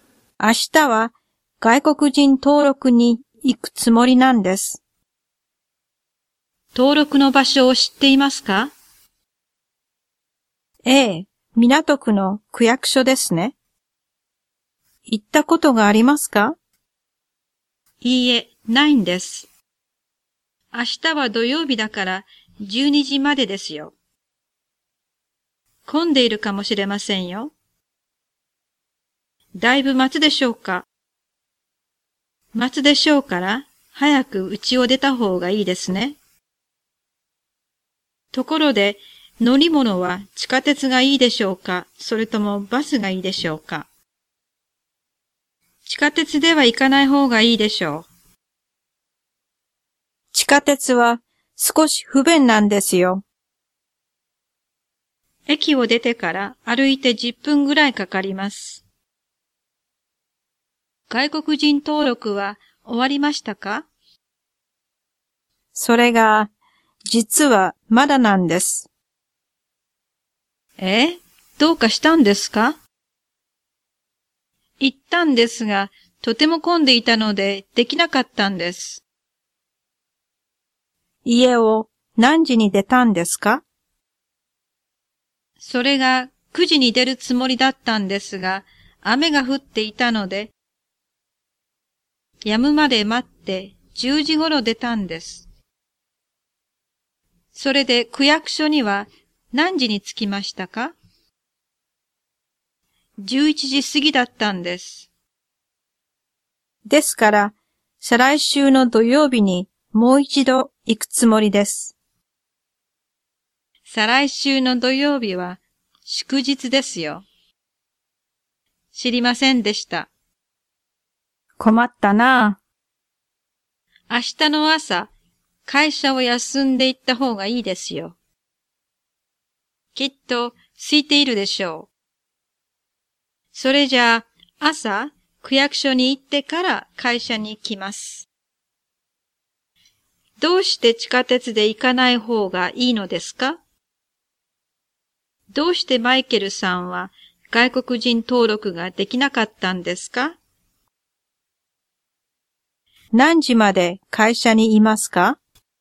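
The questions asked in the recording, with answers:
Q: どうして地下鉄で行かない方がいいのですか?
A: 地下鉄は少し不便で、駅を出てから歩いて10分ぐらいかかるから

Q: どうしてマイケルさんは外国人登録ができなかったんですか?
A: 区役所がとても混んでいたから(雨で出るのが遅れ、11時過ぎに着いた)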